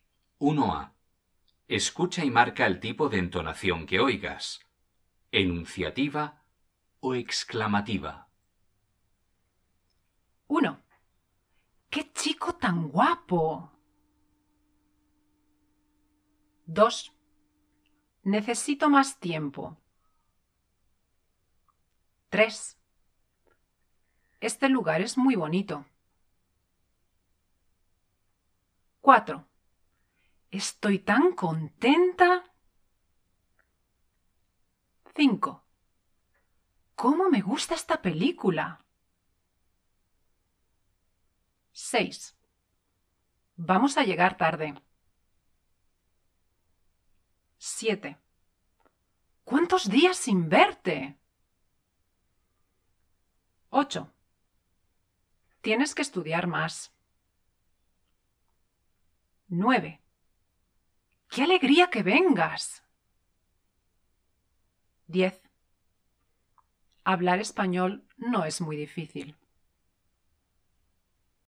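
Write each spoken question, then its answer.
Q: ¡Qué chico tan guapo!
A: exclamativa

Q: ¡Qué alegría que vengas!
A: exclamativa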